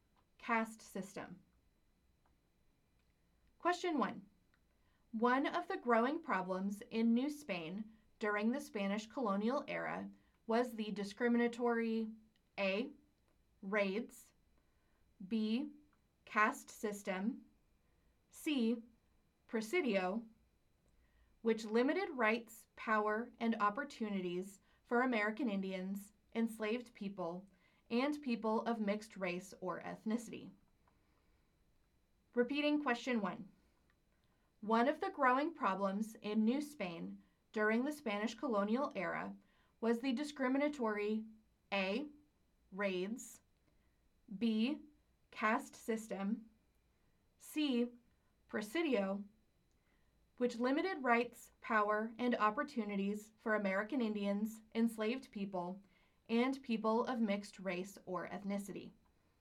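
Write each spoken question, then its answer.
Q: One of the growing problems in New Spain during the Spanish colonial era was the discriminatory A. Raids. B. Caste system. C. Presidio. Which limited rights, power, and opportunities for American Indians, enslaved people, and people of mixed race or ethnicity.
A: B: Caste system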